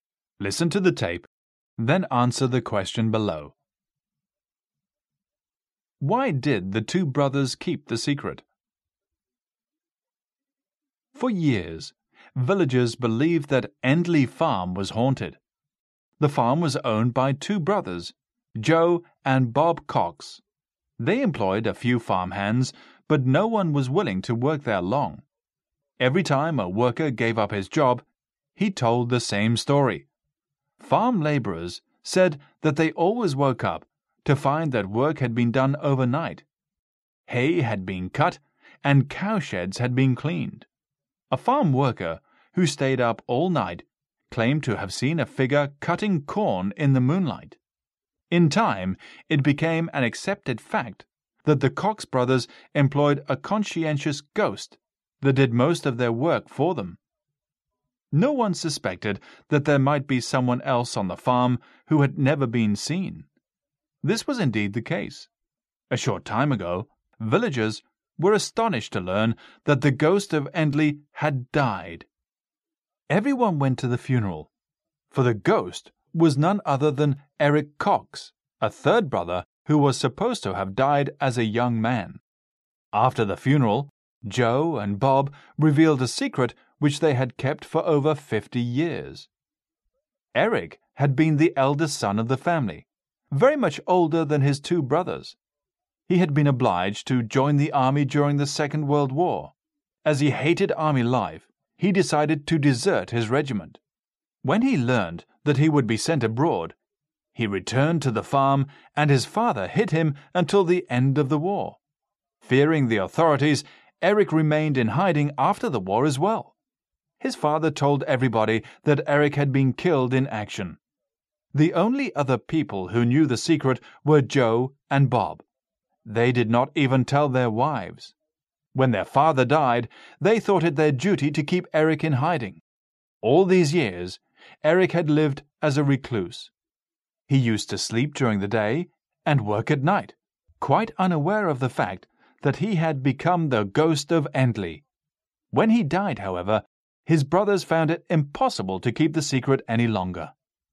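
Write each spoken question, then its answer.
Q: Why did the two brothers keep the secret?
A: To keep Eric hidden, because he had deserted the army and feared the authorities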